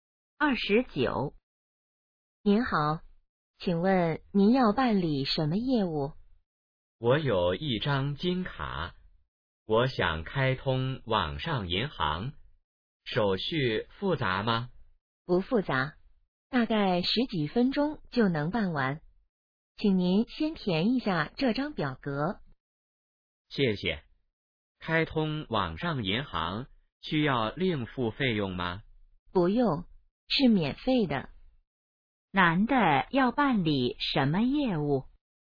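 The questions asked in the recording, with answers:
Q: 男的要办理什么业务?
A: 开通网上银行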